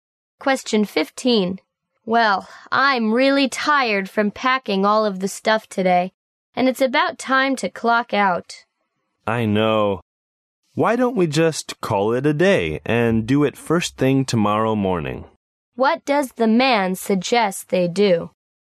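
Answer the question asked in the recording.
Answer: Stop working and continue first thing tomorrow morning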